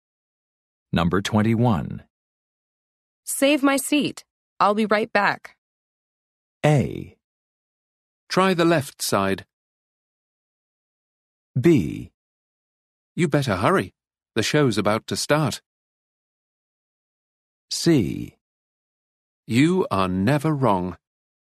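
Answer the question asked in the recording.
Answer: B: You better hurry. The show's about to start.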